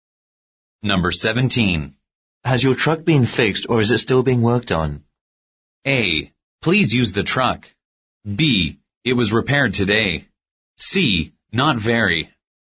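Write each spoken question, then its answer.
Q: Has your truck been fixed or is it still being worked on?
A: B: It was repaired today.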